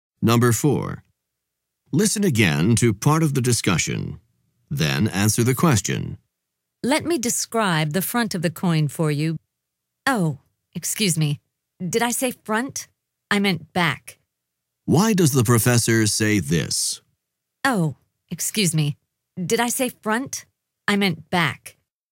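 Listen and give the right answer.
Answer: To correct a mistake: she meant the back of the coin, not the front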